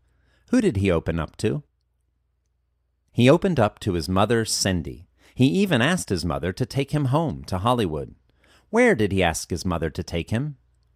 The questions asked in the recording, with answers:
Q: Where did he ask his mother to take him?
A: He asked his mother to take him home to Hollywood.